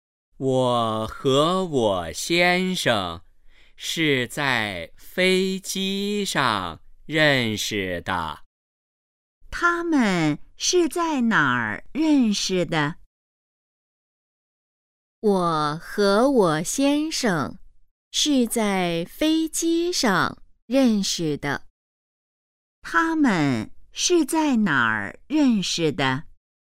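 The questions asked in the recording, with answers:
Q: 他们是在哪儿认识的?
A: 在飞机上

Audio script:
我和我先生是在飞机上认识的。
问:他们是在哪儿认识的?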